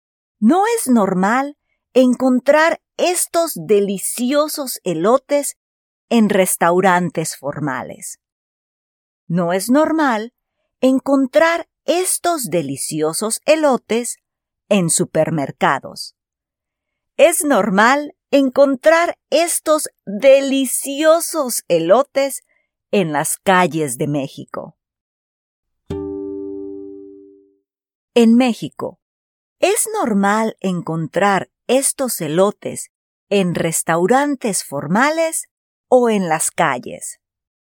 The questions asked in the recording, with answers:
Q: En México, ¿es normal encontrar estos elotes en restaurantes formales o en las calles?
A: Sí, en las calles.